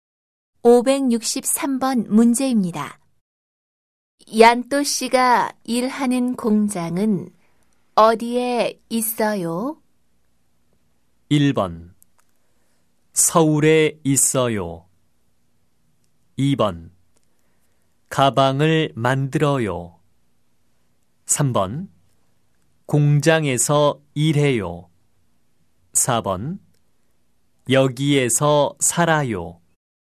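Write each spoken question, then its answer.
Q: 얀또 씨가 일하는 공장은 어디에 있어요?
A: 1: 서울에 있어요.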